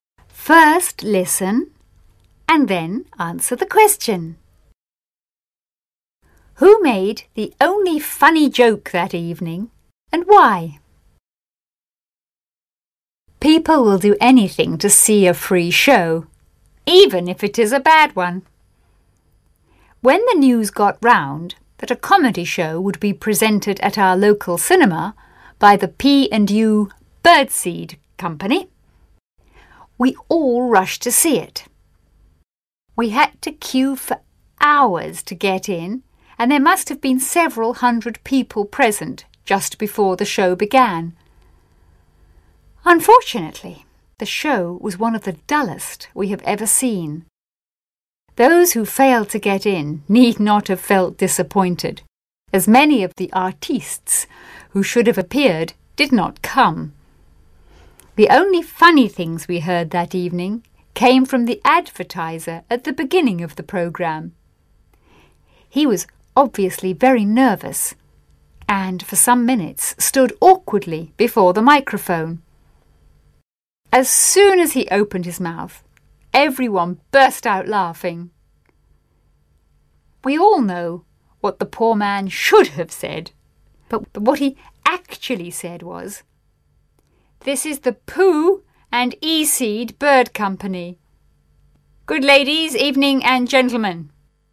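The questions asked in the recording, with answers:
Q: Who made the only funny joke that evening and why?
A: The advertiser (announcer) at the start of the programme, because he was nervous and mixed up his words.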